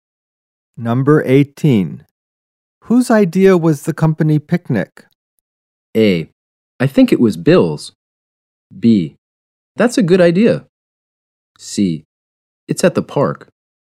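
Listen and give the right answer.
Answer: A: I think it was Bill's.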